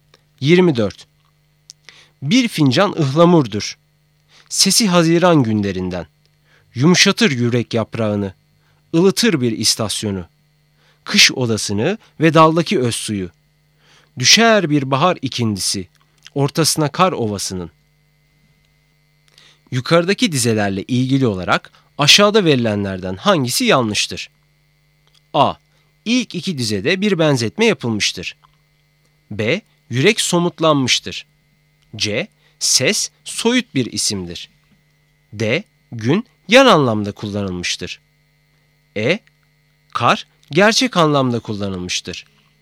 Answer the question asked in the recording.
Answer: Doğru cevap C. Ses soyut bir isimdir.